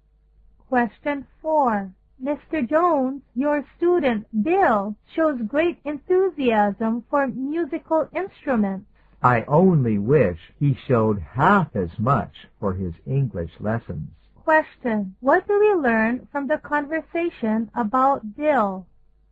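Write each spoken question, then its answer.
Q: What do we learn from the conversation about Bill?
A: He is more interested in musical instruments than in his English lessons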